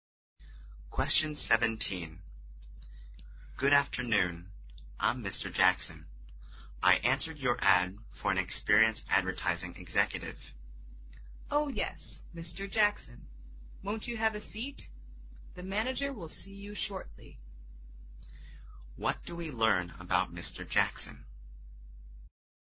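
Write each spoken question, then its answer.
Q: What do we learn about Mr. Jackson?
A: He has come for an interview for an advertising executive job.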